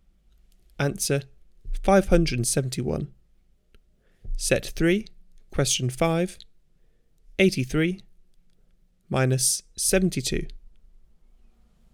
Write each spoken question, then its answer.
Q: 83 minus 72.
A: Answer 11.